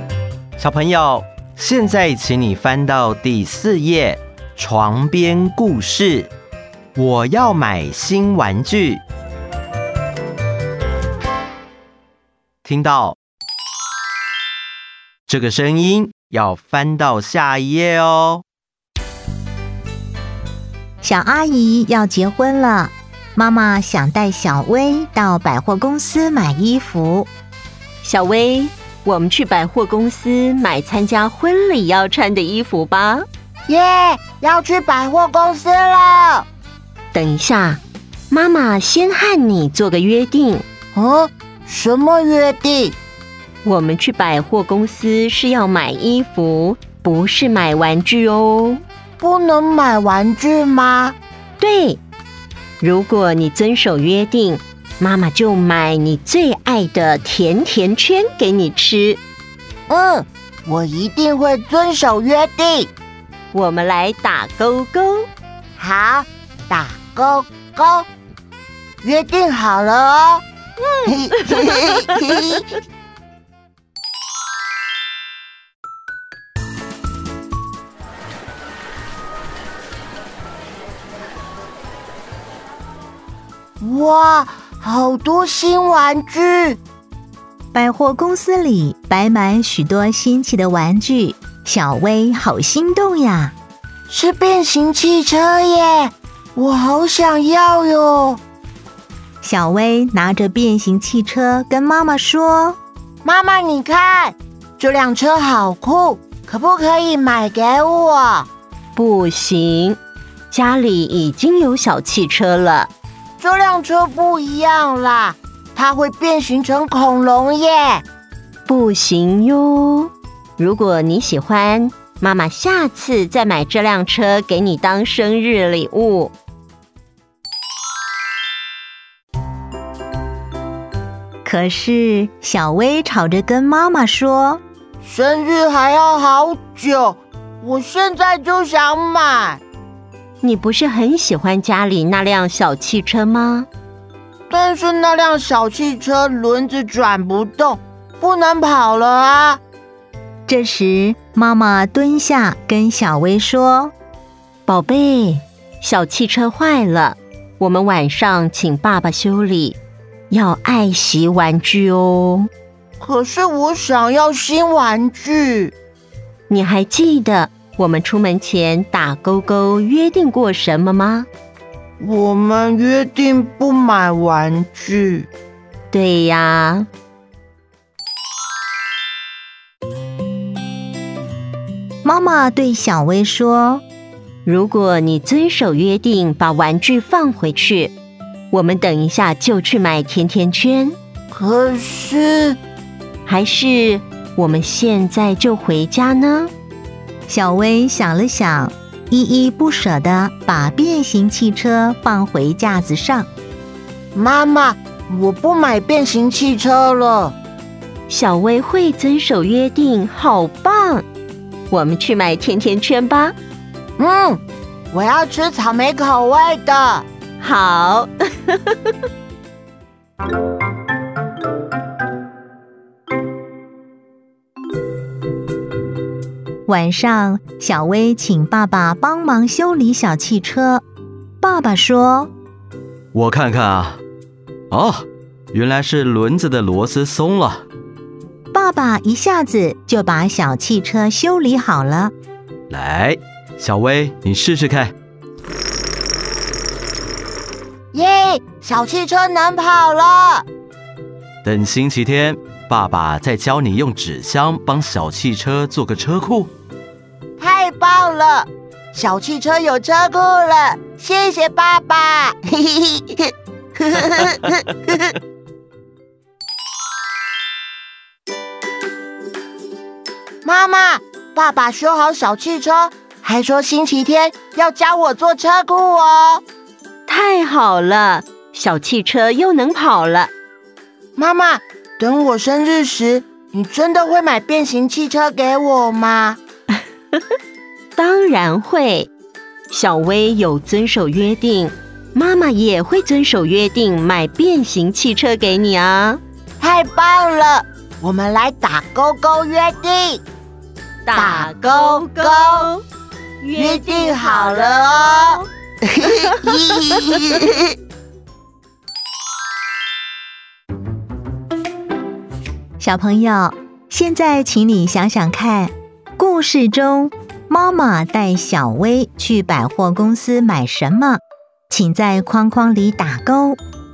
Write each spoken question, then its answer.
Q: 小朋友,现在请你想想看,故事中妈妈带小薇去百货公司买什么?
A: 衣服。